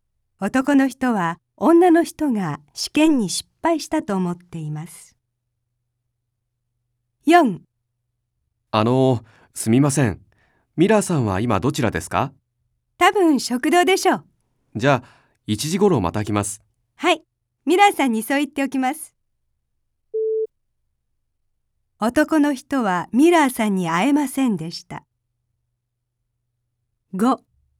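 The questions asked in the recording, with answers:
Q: 男の人はミラーさんに会えませんでした。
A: ○(正しい)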